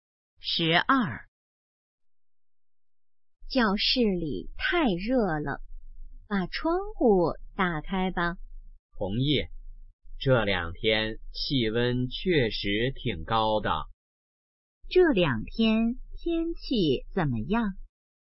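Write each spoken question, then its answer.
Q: 这两天天气怎么样?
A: 气温很高,很热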